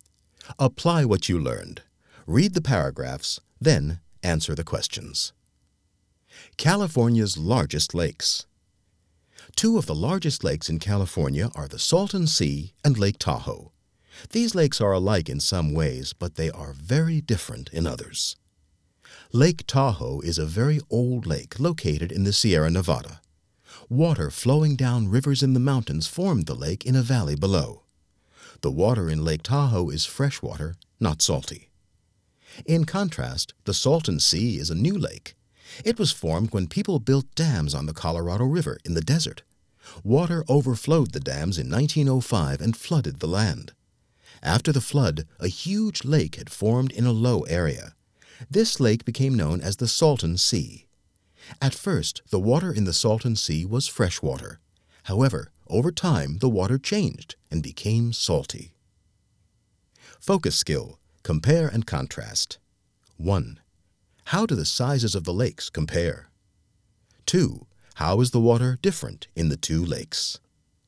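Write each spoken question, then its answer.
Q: How do the sizes of the lakes compare?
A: Both are among the largest lakes in California.

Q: How is the water different in the two lakes?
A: Lake Tahoe has fresh water; the Salton Sea's water became salty.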